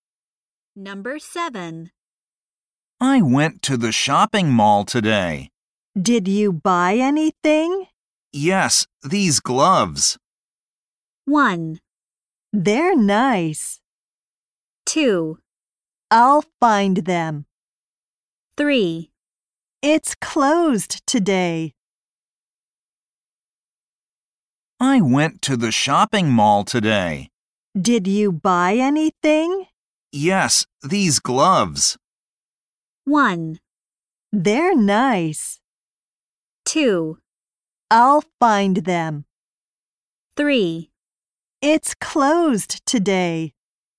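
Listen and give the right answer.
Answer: 1: They're nice.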